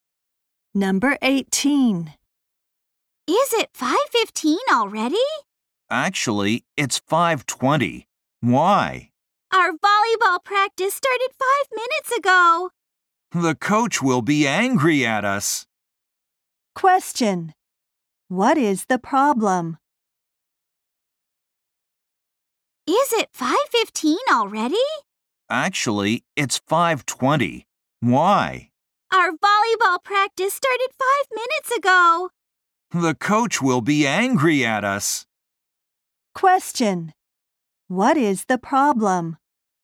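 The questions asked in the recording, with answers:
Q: What is the problem?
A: They are late for volleyball practice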